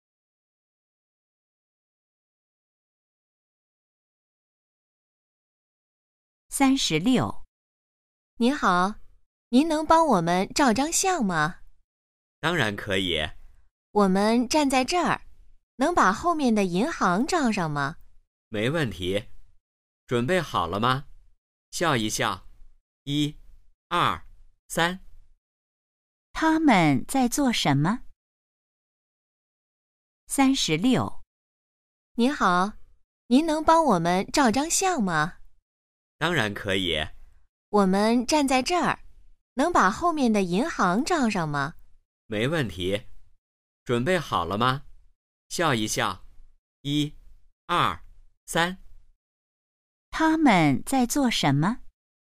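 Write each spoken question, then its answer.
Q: 他们在做什么?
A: 照相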